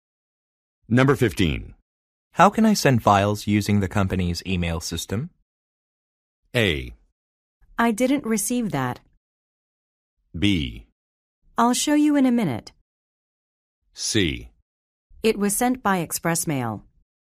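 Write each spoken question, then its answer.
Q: How can I send files using the company's email system?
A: B: I'll show you in a minute.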